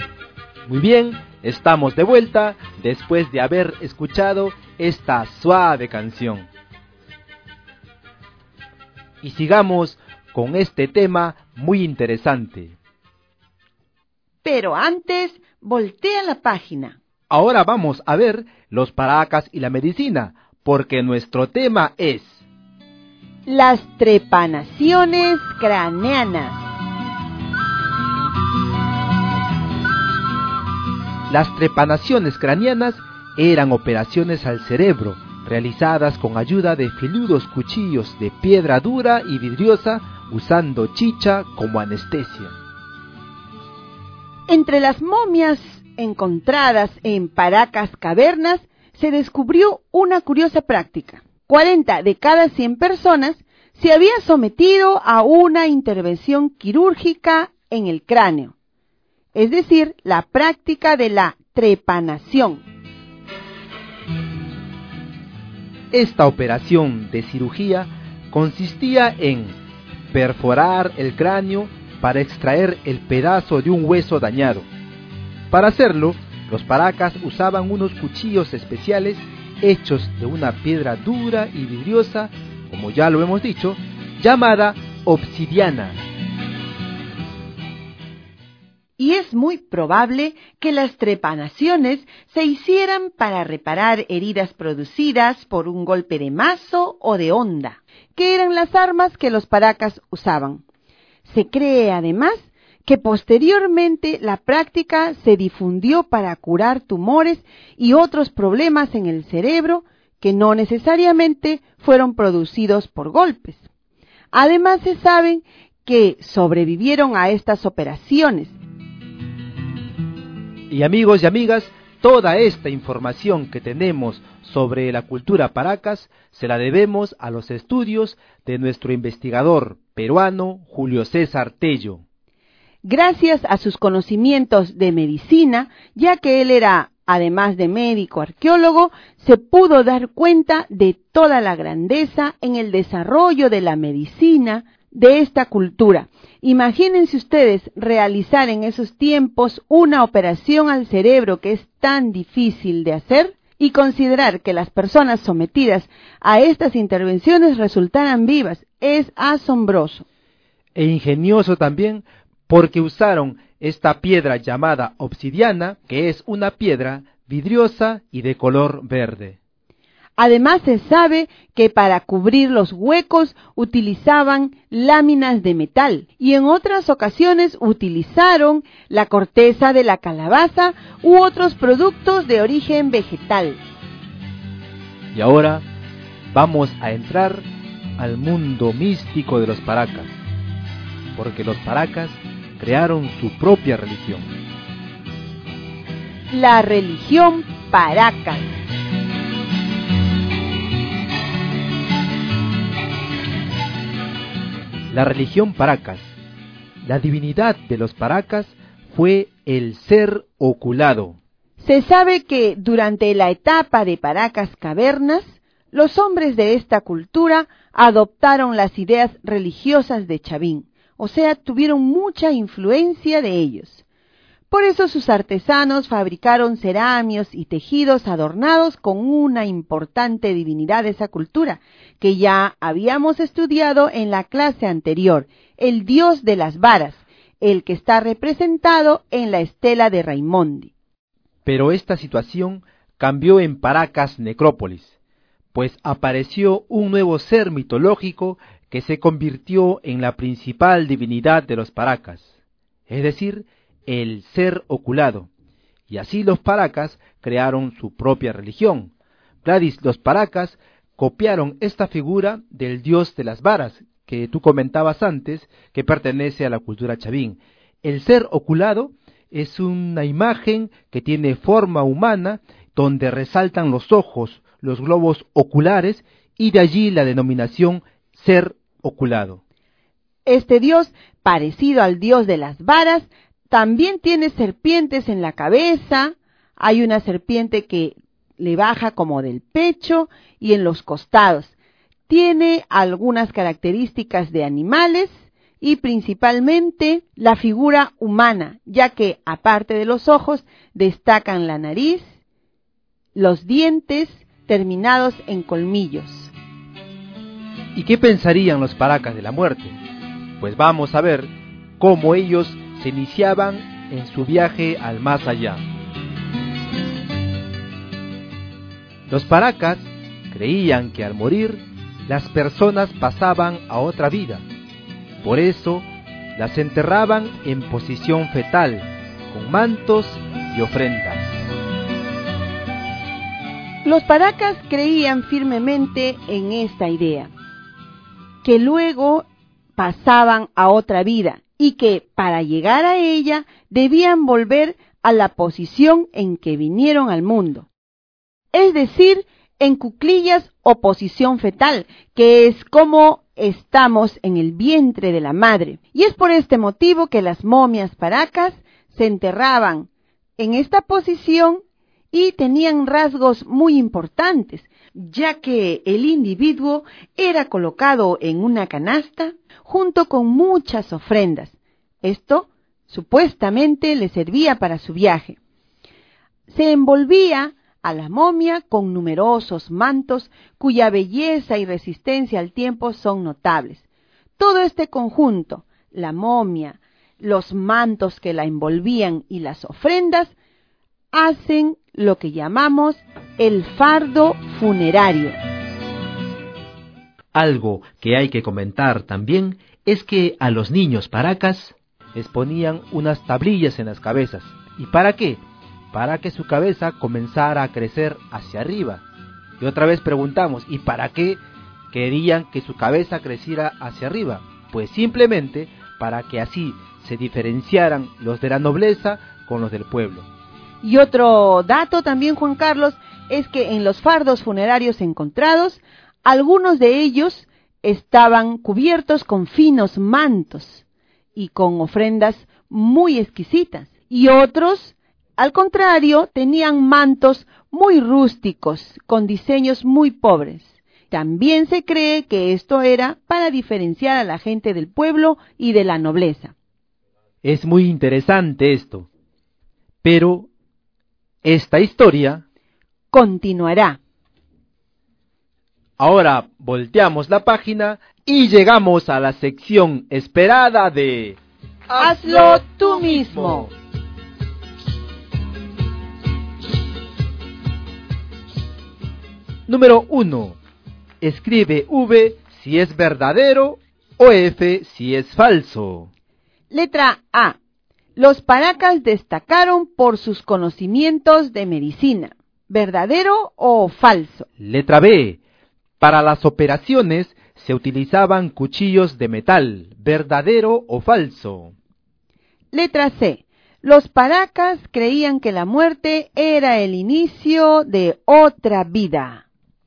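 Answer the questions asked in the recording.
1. Verdadero
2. Falso
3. Verdadero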